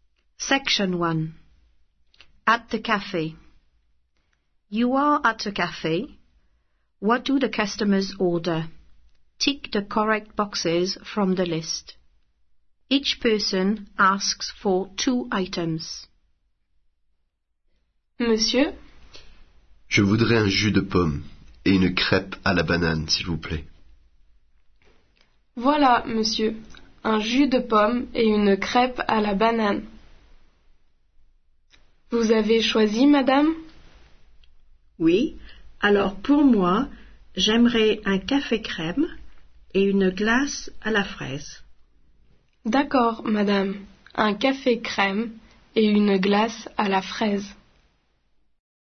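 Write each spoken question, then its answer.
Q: What do the customers order?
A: Man: apple juice and banana crêpe; woman: white coffee and strawberry ice cream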